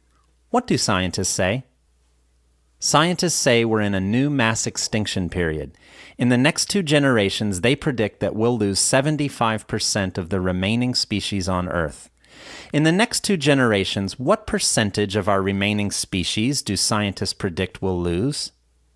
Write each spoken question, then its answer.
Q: In the next two generations, what percentage of our remaining species do scientists predict we'll lose?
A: In the next two generations, they predict that we'll lose 75% of the remaining species on Earth.